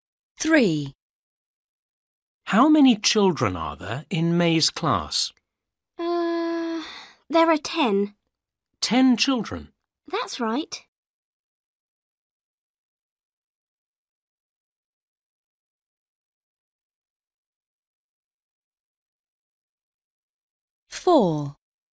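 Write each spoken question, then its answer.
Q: How many children are there in May's class?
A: 10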